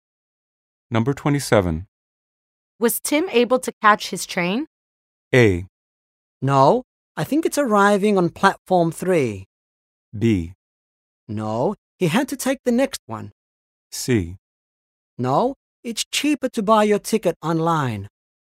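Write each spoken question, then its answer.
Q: Was Tim able to catch his train?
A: B: No, he had to take the next one.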